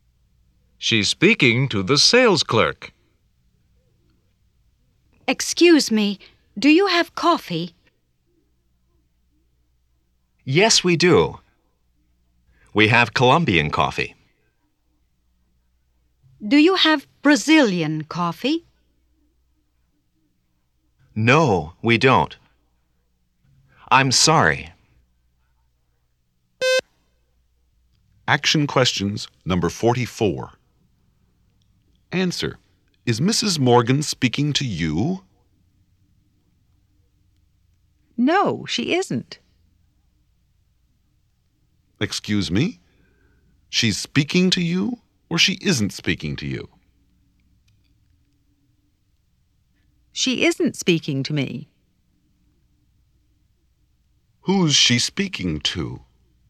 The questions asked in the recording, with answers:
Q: Who's she speaking to?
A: She's speaking to the sales clerk.